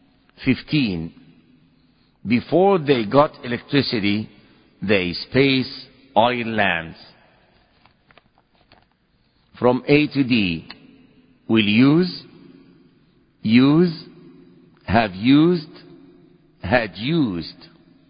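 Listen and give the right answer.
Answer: D: had used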